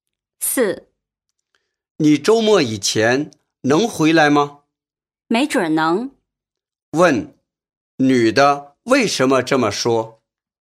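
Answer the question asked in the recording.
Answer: 她不确定能不能在周末以前回来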